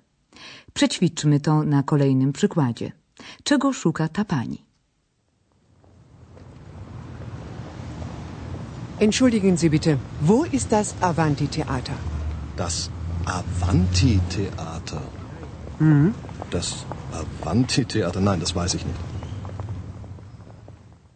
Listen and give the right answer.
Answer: Osoba ta szuka oczywiście teatru o nazwie Avanti Teata.